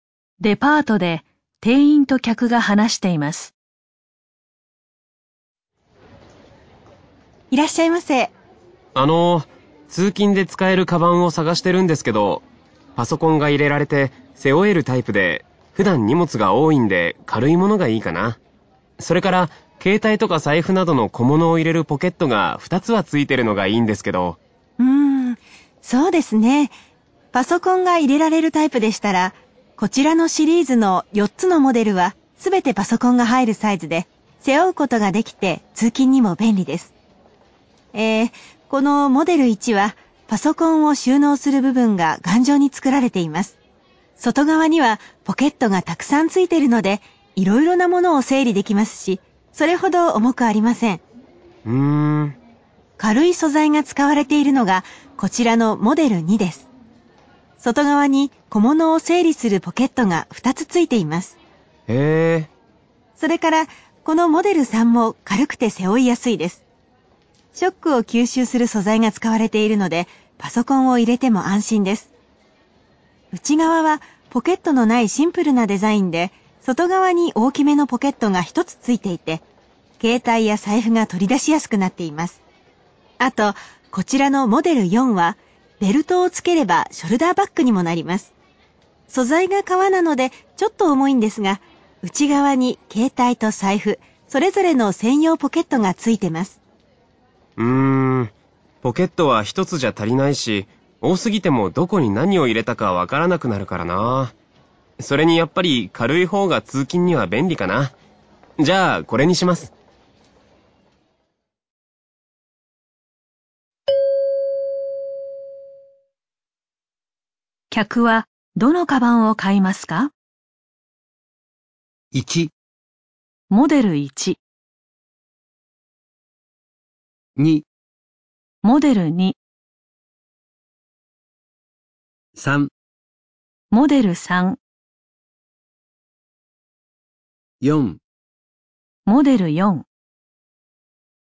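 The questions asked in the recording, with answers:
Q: 客はどのカバンを買いますか?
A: 2: モデル2。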